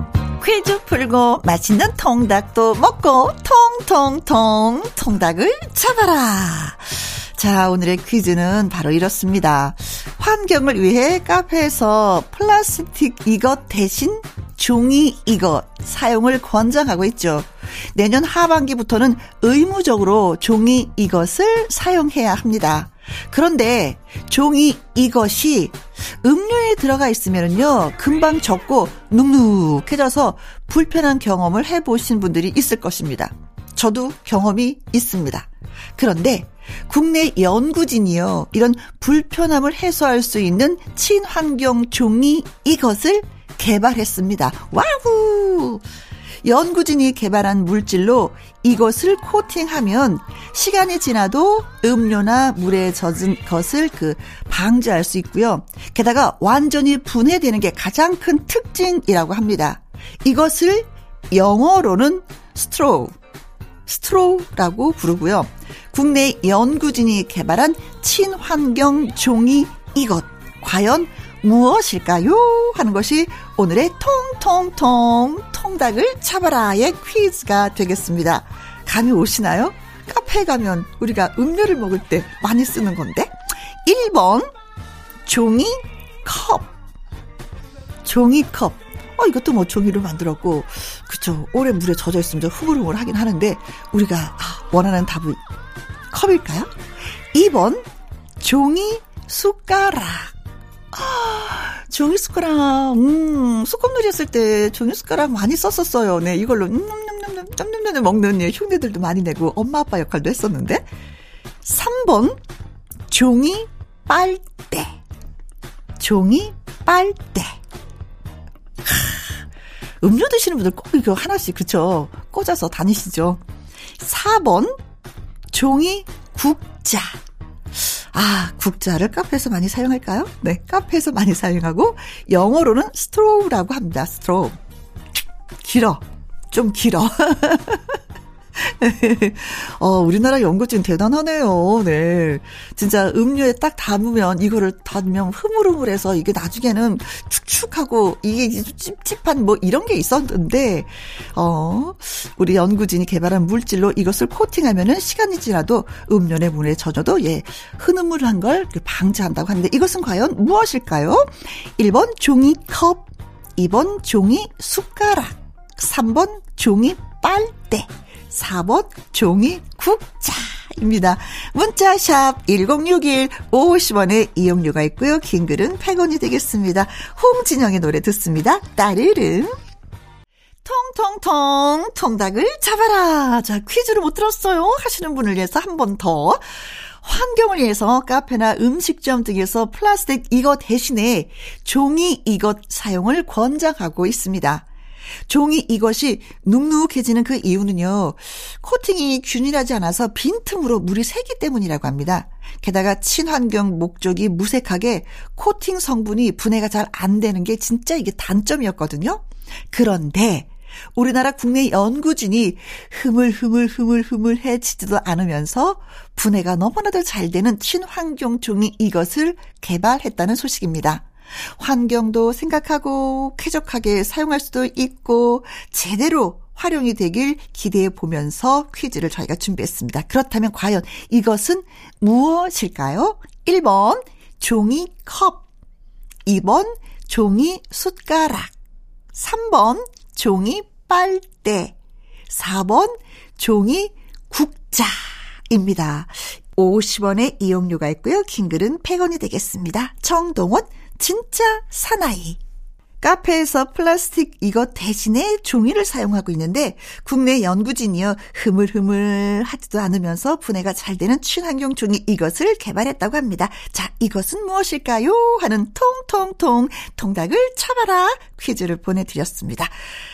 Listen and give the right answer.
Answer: 정답은 음흠, 종이 빨대 3번이 정답이었습니다.